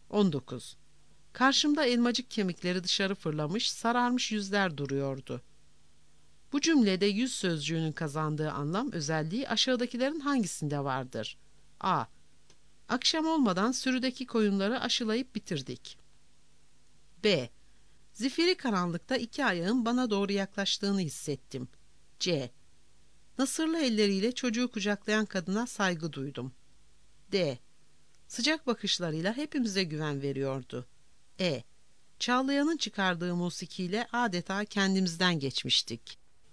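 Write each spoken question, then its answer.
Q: Bu cümlede yüz sözcüğünün kazandığı anlam özelliği aşağıdakilerin hangisinde vardır?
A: B: Zifiri karanlıkta iki ayağın bana doğru yaklaştığını hissettim.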